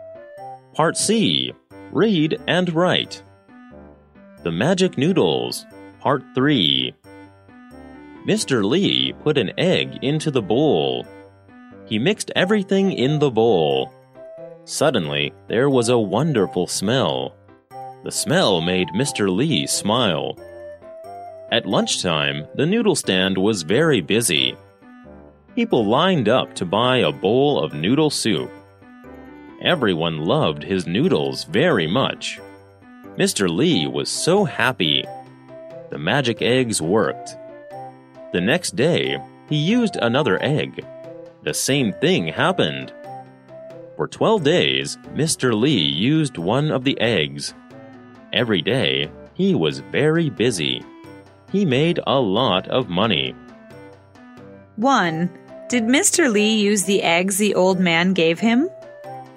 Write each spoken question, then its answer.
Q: Did Mr. Lee use the eggs the old man gave him?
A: Yes, he did. He used the eggs.